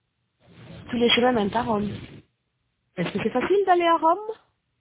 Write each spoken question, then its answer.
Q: Est-ce que c'est facile d'aller à Rome?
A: Oui. Tous les chemins mènent à Rome.